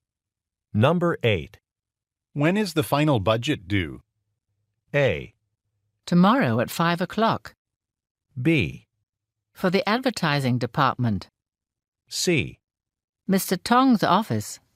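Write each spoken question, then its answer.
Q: When is the final budget due?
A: A: Tomorrow at 5 o'clock.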